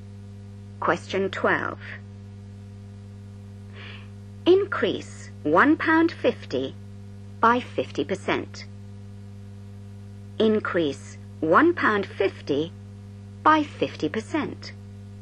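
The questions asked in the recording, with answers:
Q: Increase £1.50 by 50%.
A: £2.25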